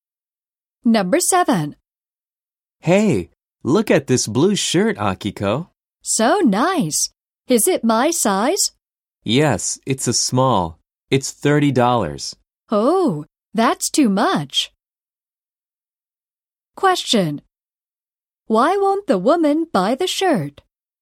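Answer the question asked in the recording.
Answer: Because it is too expensive.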